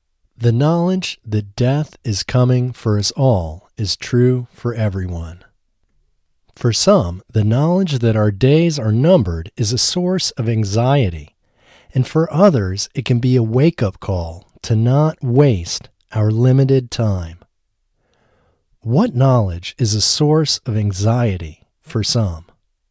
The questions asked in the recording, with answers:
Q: What knowledge is a source of anxiety for some?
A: The knowledge that our days are numbered is a source of anxiety for some.